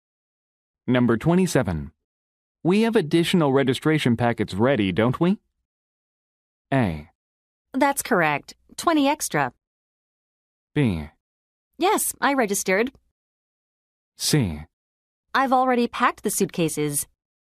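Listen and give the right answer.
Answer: A: That's correct. 20 extra.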